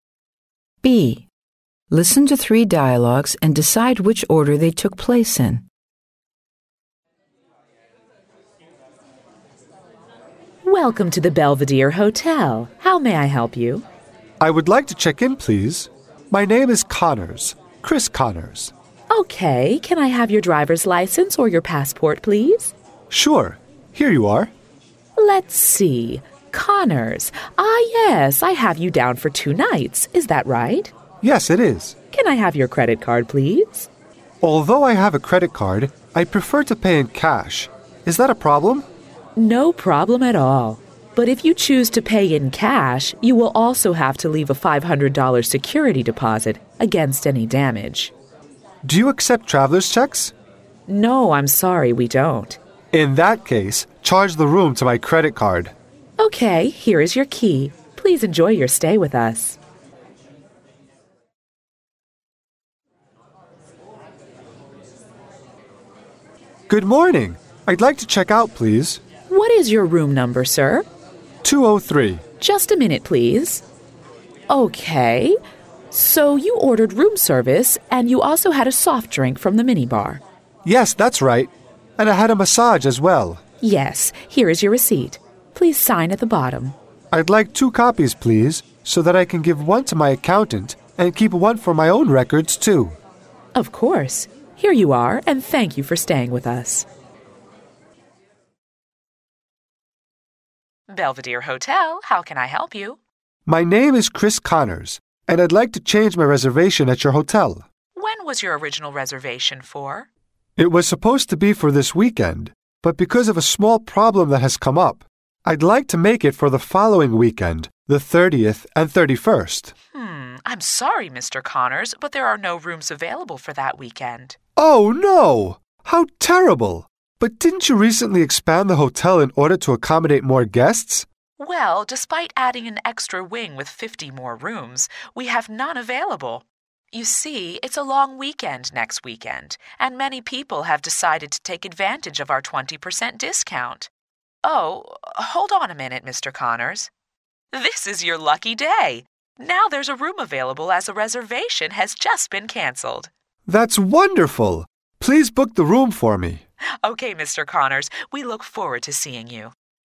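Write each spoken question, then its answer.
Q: Listen to three dialogues and decide which order they took place in.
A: Dialogue 3 (changing the reservation) came first, then Dialogue 1 (check-in), then Dialogue 2 (check-out)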